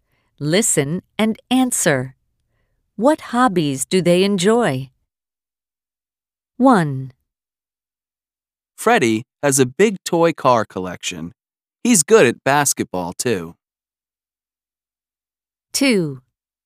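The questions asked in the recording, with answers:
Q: What hobbies do they enjoy?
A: Freddie collects toy cars and plays basketball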